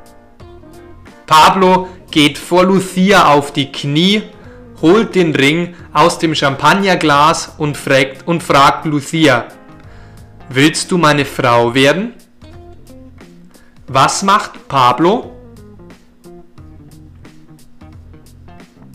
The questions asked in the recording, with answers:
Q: Was macht Pablo?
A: Pablo geht vor Lucia auf die Knie.